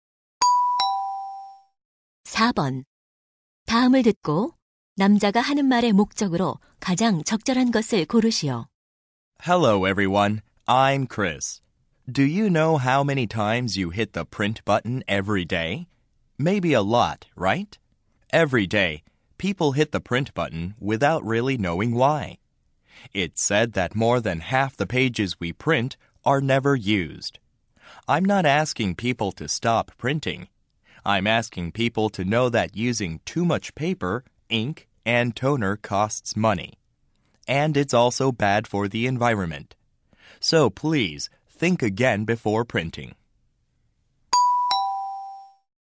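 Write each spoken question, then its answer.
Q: 다음을 듣고 남자가 하는 말의 목적으로 가장 적절한 것을 고르시오.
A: 인쇄하기 전에 다시 생각해 종이 낭비를 줄이자고 당부하려고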